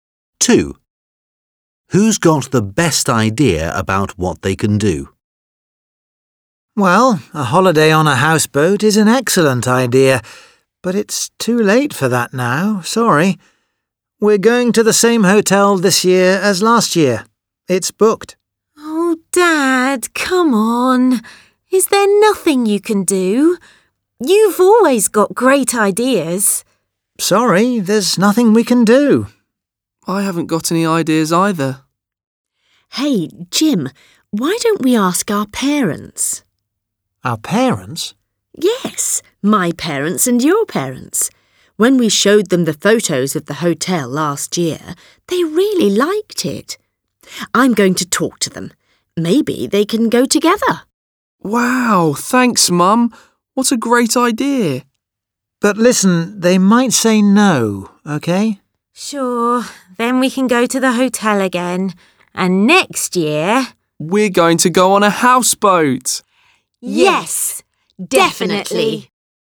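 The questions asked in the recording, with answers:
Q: Who's got the best idea about what they can do?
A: Mum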